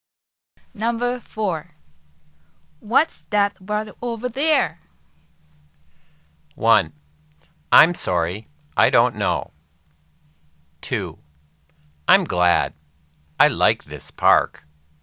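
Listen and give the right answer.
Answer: 1: I'm sorry, I don't know.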